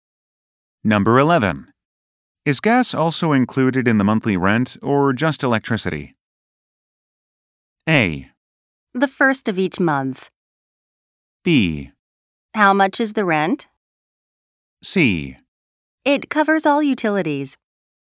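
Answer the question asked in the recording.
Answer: C: It covers all utilities.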